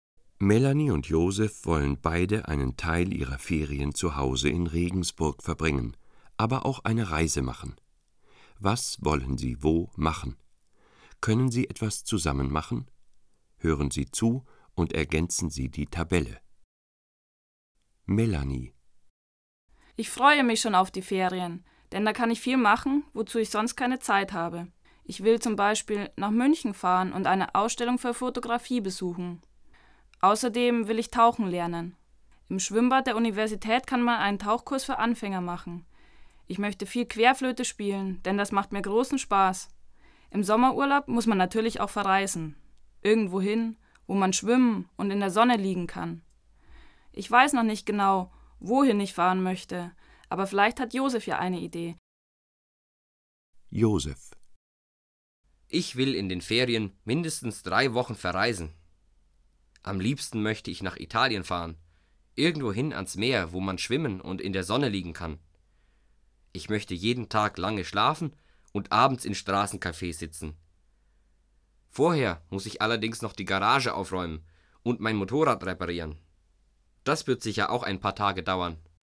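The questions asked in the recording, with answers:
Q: Können sie etwas zusammen machen?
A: Ja, sie können zusammen ans Meer (z. B. nach Italien) reisen, um zu schwimmen und in der Sonne zu liegen.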